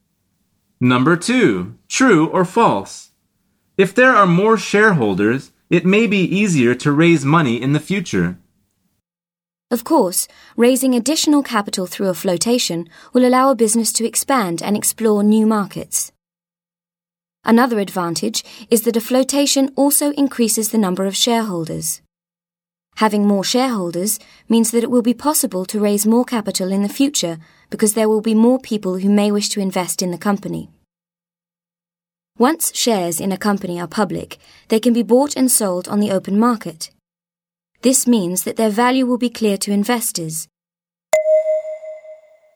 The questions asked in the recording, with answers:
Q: True or false? If there are more shareholders, it may be easier to raise money in the future.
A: The answer is true.